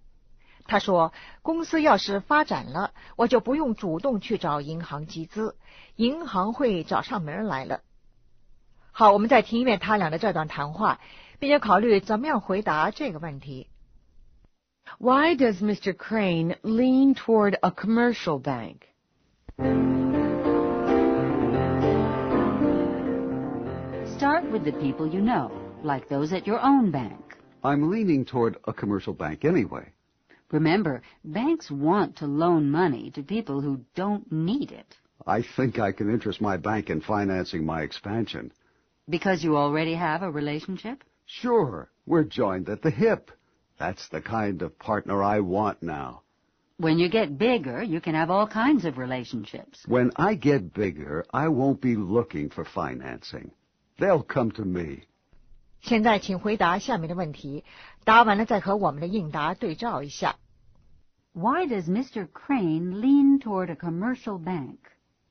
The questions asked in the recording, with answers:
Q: Why does Mr. Crane lean toward a commercial bank?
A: He already has a strong relationship.